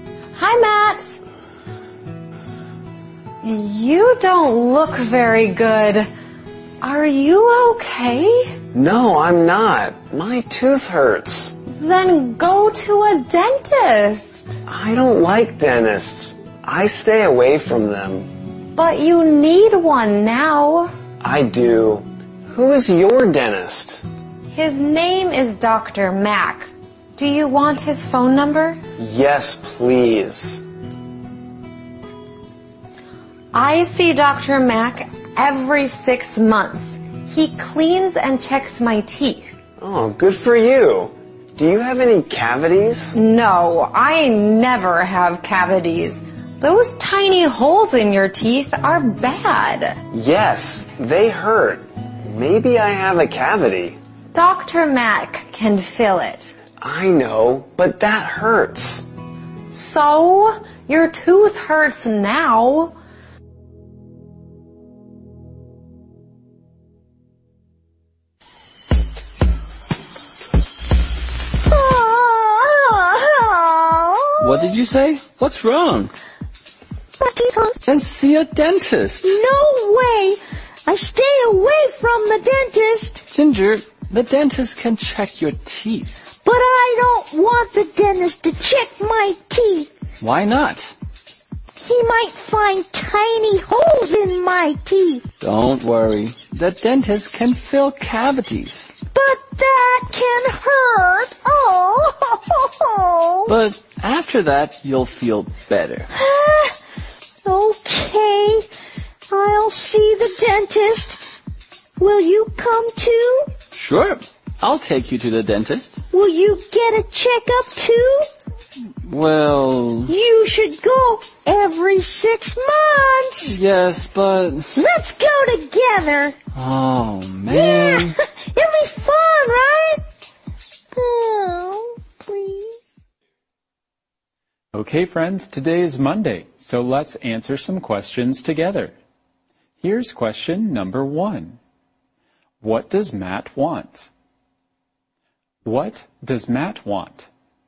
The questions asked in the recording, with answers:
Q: What does Matt want? What does Matt want?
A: He wants Dr. Mack's phone number.